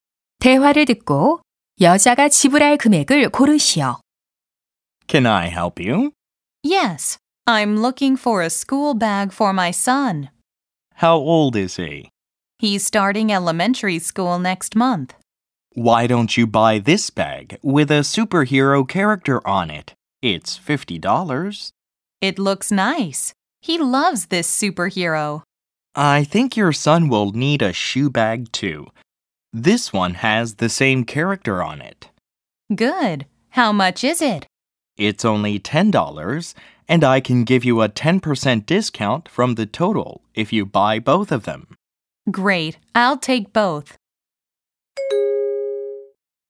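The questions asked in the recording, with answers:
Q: 대화를 듣고 여자가 지불할 금액을 고르시오.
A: 54달러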